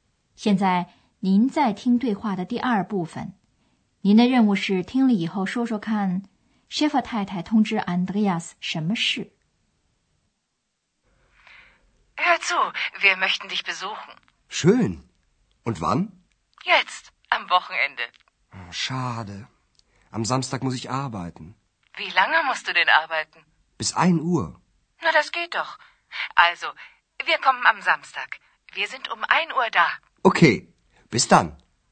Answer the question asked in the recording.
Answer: 安德烈斯的妈妈告诉他,他们星期六一点钟到那儿,也就是到雅琛他的饭店里。